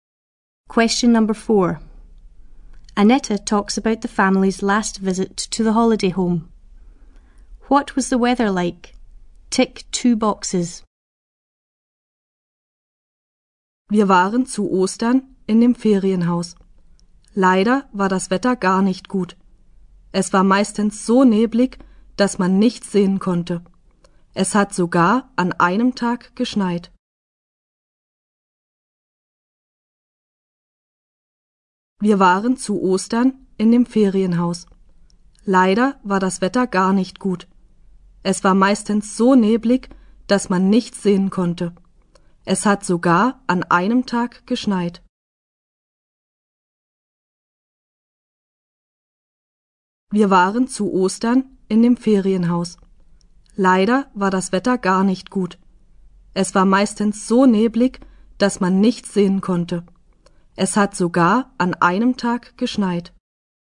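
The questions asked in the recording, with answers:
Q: What was the weather like?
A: Mostly foggy; it even snowed one day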